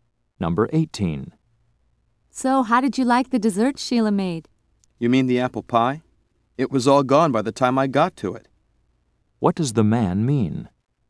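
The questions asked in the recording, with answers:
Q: What does the man mean?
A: He didn't get to taste the pie.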